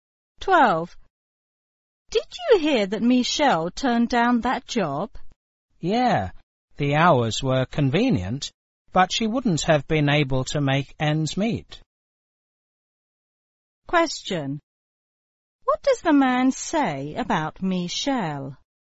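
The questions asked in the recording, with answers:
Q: What does the man say about Michelle?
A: The job would not have paid her enough to live on.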